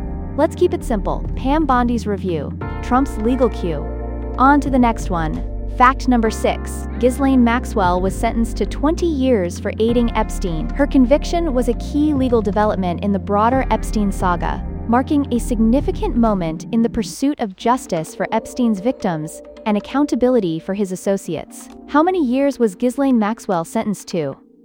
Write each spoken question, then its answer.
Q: How many years was Ghislaine Maxwell sentenced to?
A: Correct answer, 20 years.